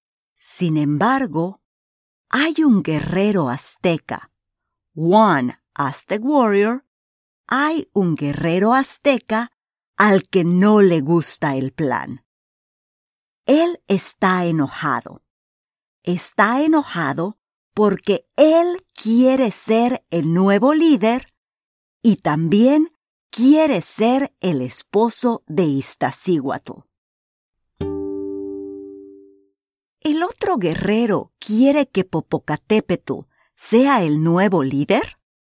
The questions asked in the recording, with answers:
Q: ¿El otro guerrero quiere que Popocatépetl sea el nuevo líder?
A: No no quiere que Popocatépetl sea el nuevo líder de los aztecas.